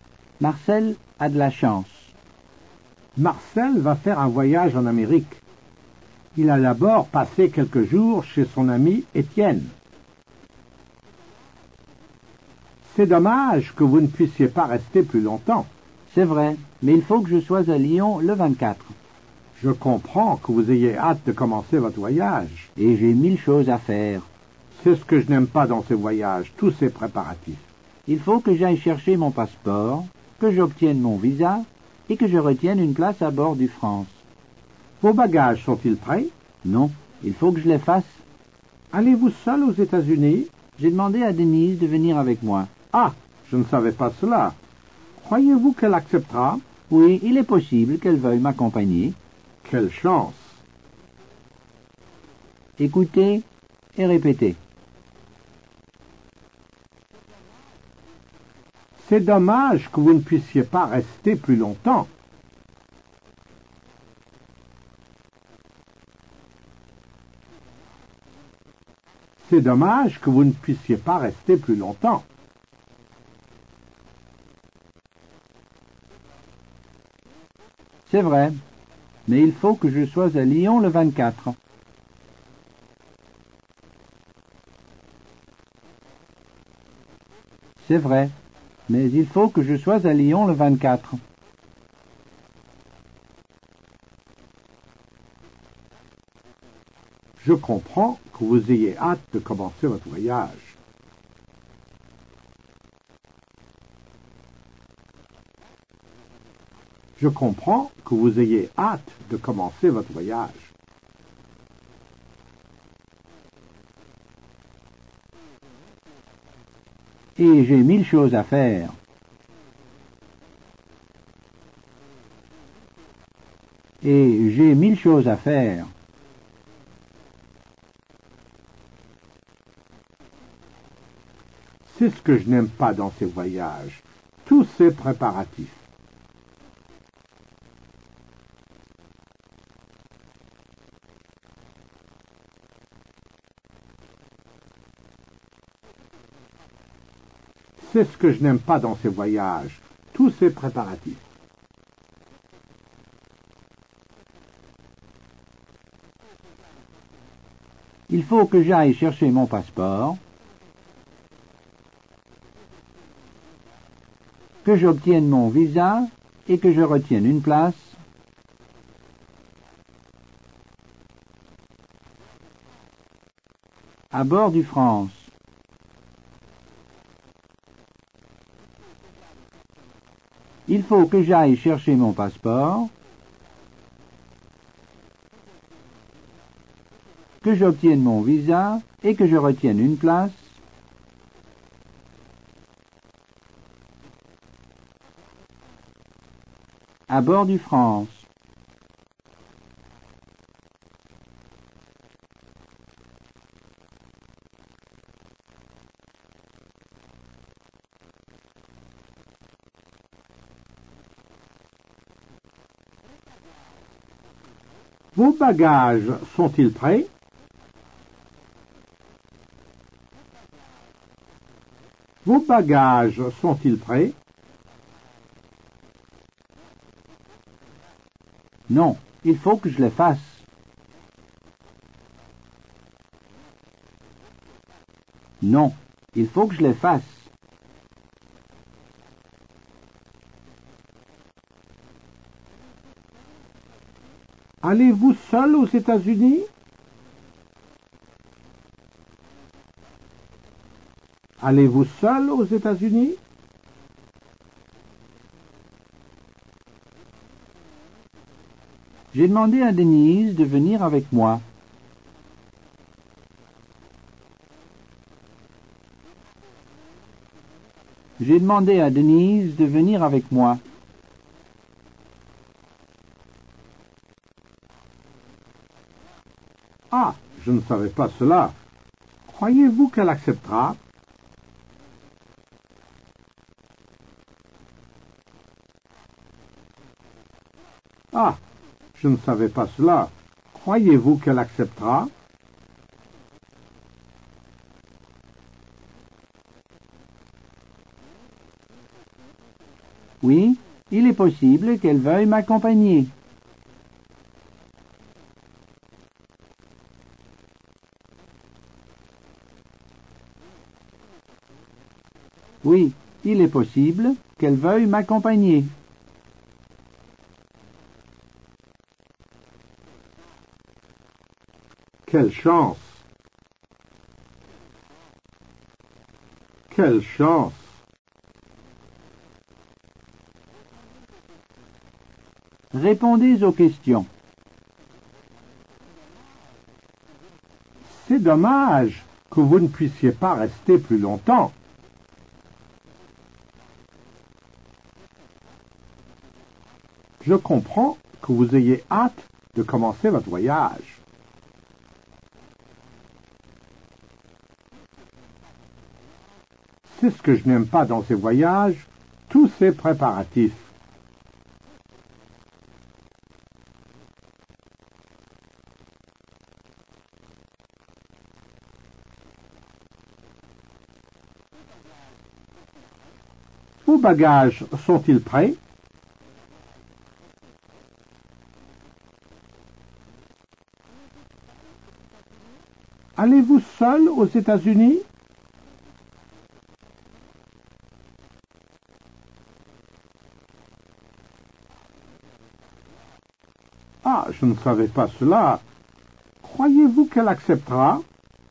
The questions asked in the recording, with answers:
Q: Vos bagages sont-ils prêts?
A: Non, il faut que je les fasse.

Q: Allez-vous seul aux États-Unis?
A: J'ai demandé à Denise de venir avec moi.

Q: Croyez-vous qu'elle acceptera?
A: Oui, il est possible qu'elle veuille m'accompagner.